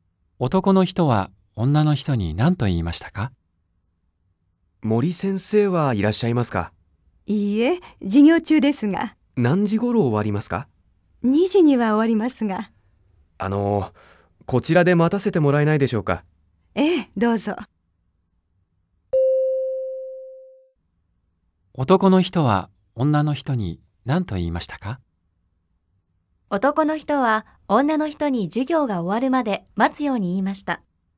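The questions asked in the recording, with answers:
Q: 男の人は女の人に何と言いましたか?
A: ×(男の人は、ここで待たせてもらえないかと頼んだ)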